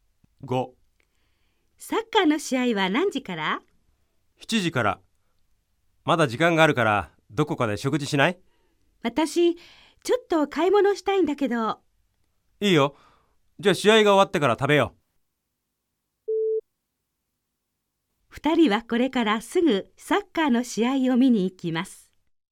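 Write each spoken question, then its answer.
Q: 二人はこれからすぐサッカーの試合を見に行きます。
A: ×(まず買い物をする)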